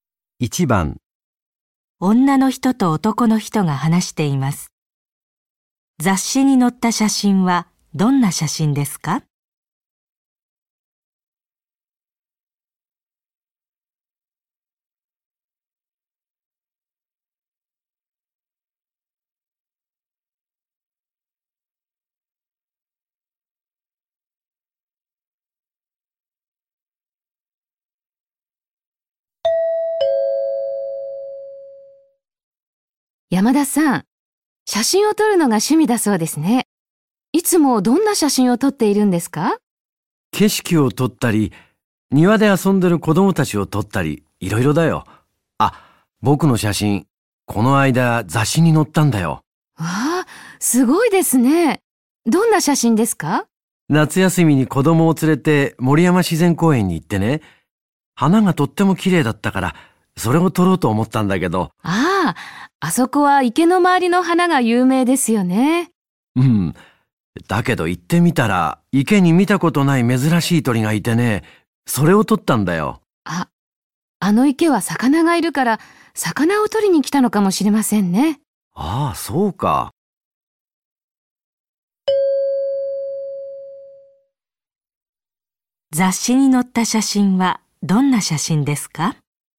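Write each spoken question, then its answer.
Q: 雑誌に載った写真はどんな写真ですか?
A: 池にいた珍しい鳥の写真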